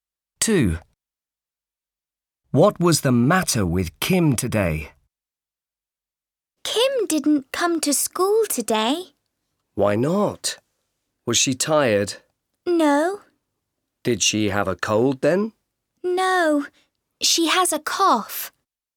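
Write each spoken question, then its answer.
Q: What was the matter with Kim today?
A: She has a cough.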